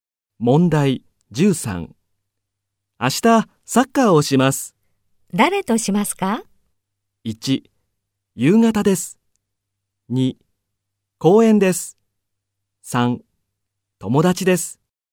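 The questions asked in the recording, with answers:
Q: 誰としますか?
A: 1: 友達です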